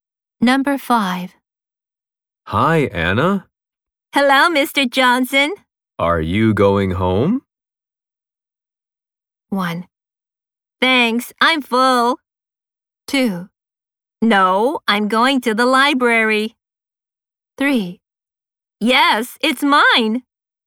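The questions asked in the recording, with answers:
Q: Are you going home?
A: 2: No, I'm going to the library.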